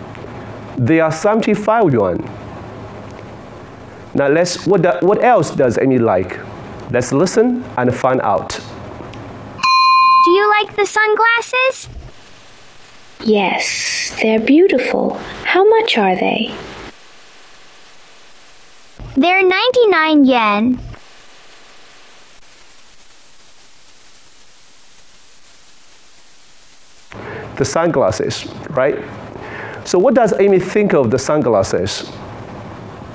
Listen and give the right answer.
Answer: They are beautiful.